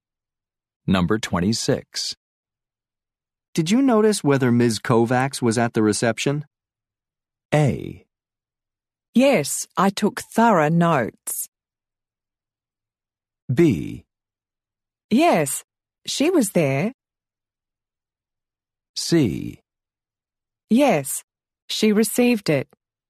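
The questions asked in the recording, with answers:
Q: Did you notice whether Ms. Kovacs was at the reception?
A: B: Yes, she was there.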